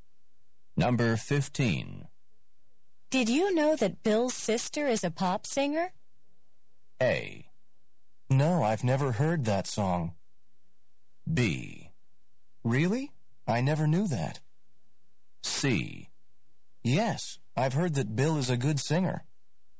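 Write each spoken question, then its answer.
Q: Did you know that Bill's sister is a pop singer?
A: B: Really? I never knew that.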